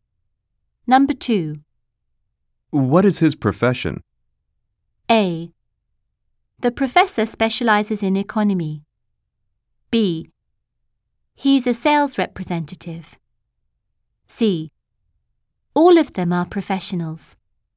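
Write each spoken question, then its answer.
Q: What is his profession?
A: B: He's a sales representative.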